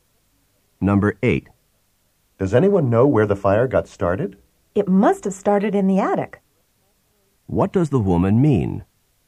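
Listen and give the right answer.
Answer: The fire probably began in the attic.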